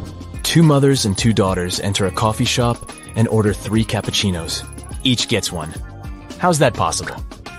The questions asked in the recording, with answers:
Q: Each gets one. How's that possible?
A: They are a grandmother, a daughter, and a granddaughter.